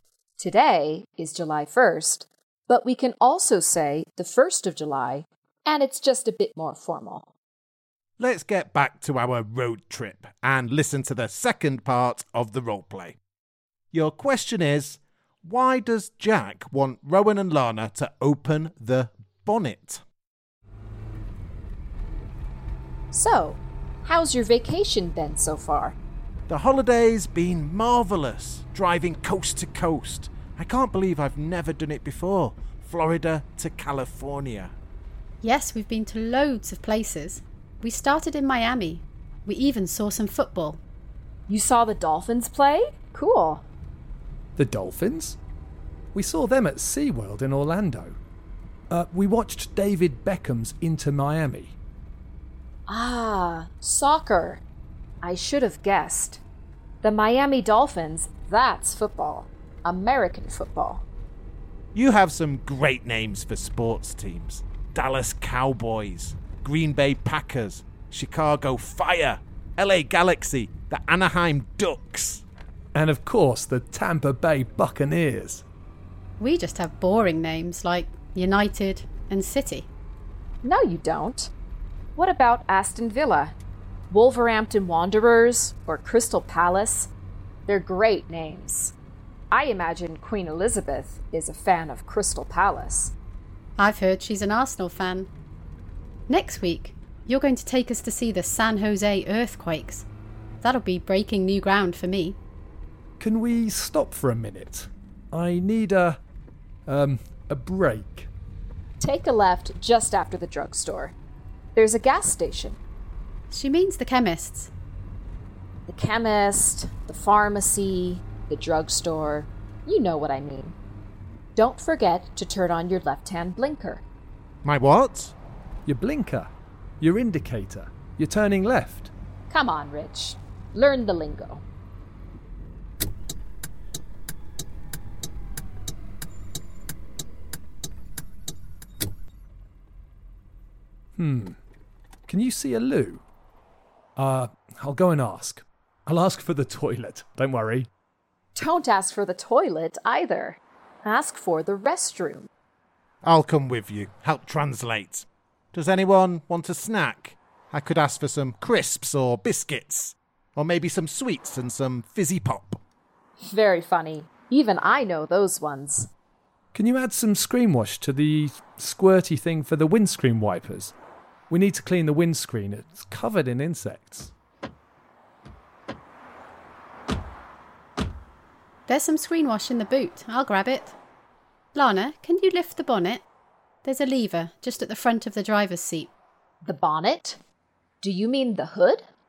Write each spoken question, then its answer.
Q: why does Jack want Rowan and Lana to open the bonnet?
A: Well, we needed to add some screen wash to use the windscreen wipers.